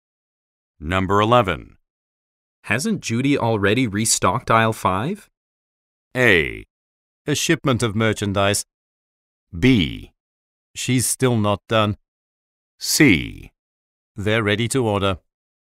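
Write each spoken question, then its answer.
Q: Hasn't Judy already restocked aisle 5?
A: B: She's still not done.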